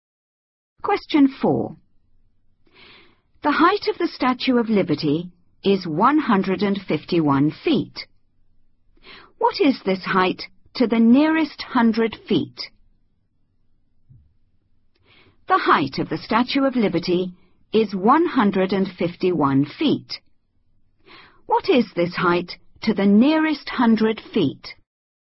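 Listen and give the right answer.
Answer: 200 feet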